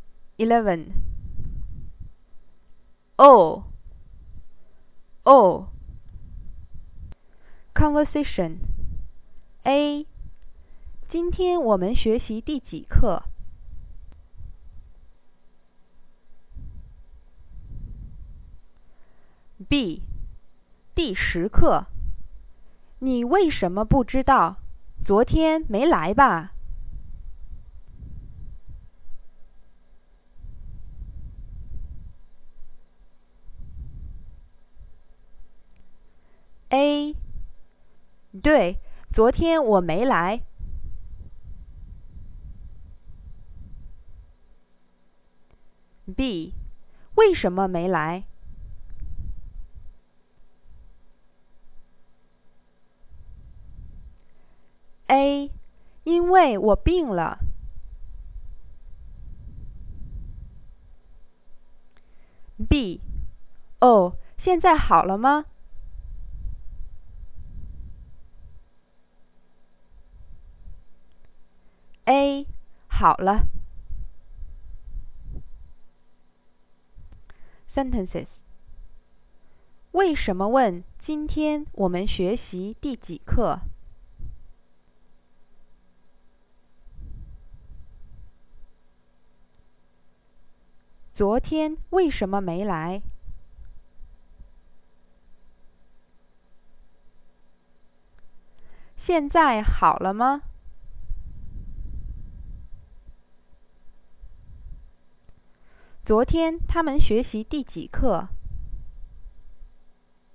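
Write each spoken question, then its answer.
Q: 为什么问今天我们学习第几课?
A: 因为他昨天没来。

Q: 昨天为什么没来?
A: 因为他病了。

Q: 现在好了吗?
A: 好了。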